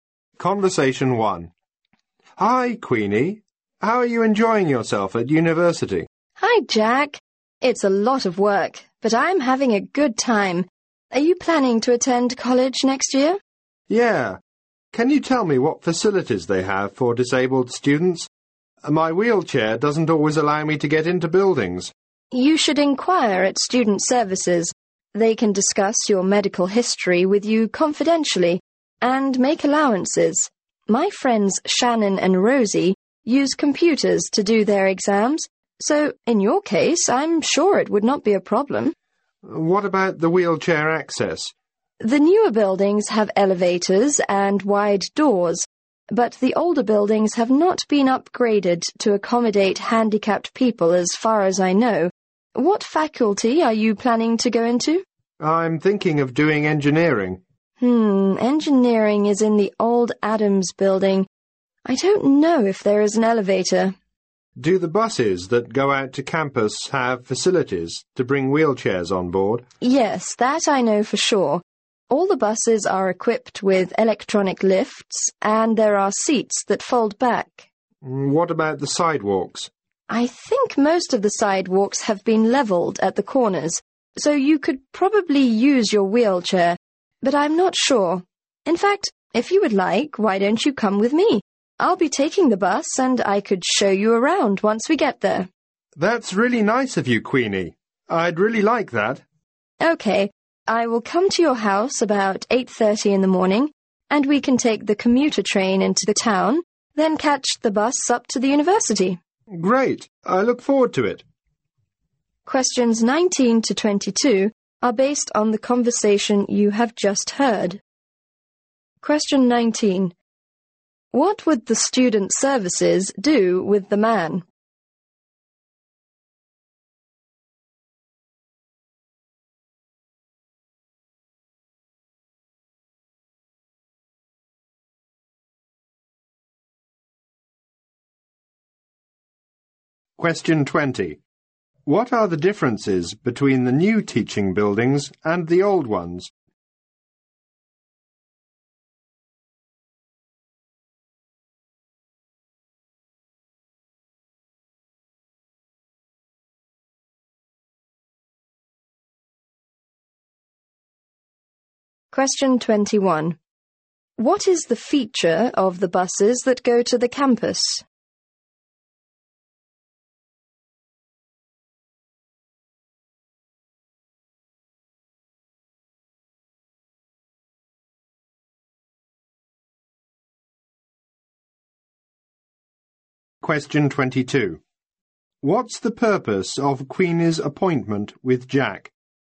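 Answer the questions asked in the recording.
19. Discuss his medical history confidentially and make allowances
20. The new ones have elevators and wide doors; the old ones haven't been upgraded
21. They have electronic lifts and seats that fold back
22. To show him around the university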